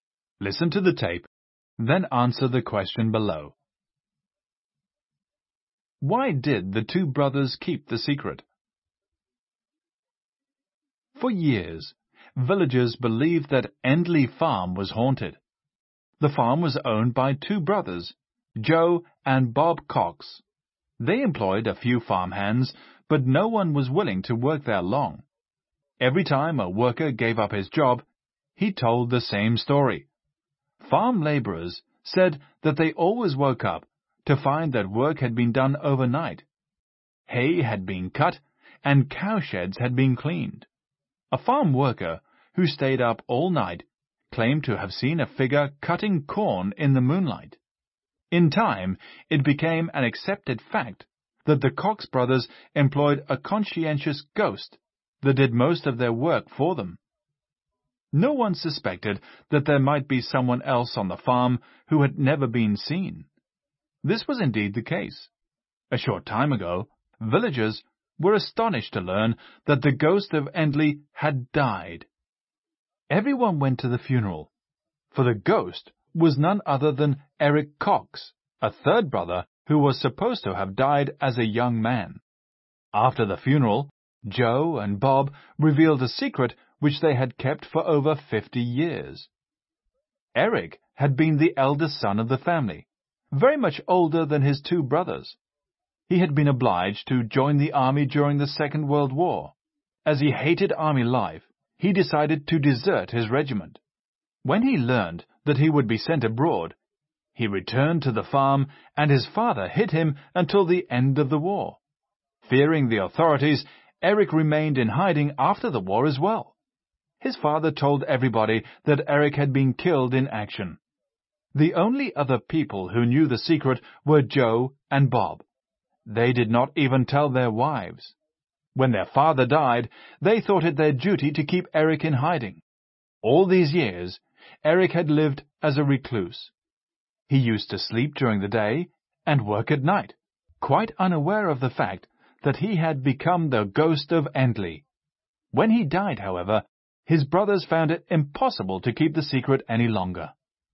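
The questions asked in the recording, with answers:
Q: Why did the two brothers keep the secret?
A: To keep Eric hidden, because he had deserted the army and feared the authorities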